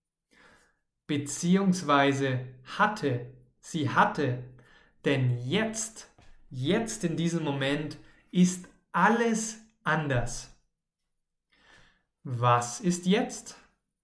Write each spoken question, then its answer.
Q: Was ist jetzt?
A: Alles ist anders.